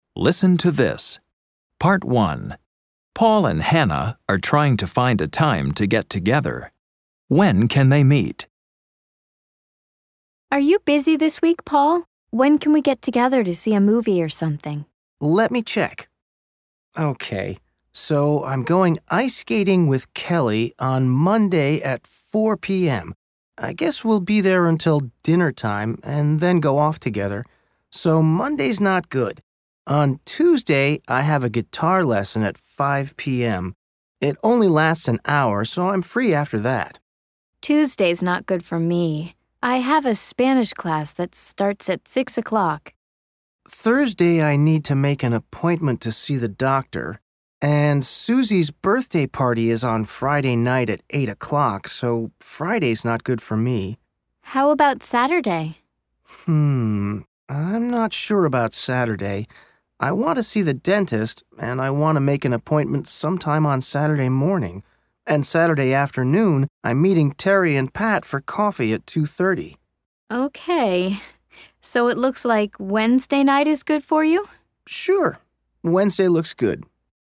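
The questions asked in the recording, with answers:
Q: When can they meet?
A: Wednesday night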